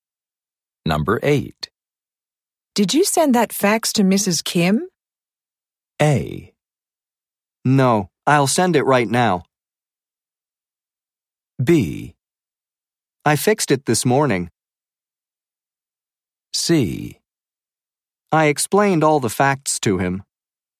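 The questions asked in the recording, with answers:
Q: Did you send that fax to Mrs.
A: A: No, I'll send it right now.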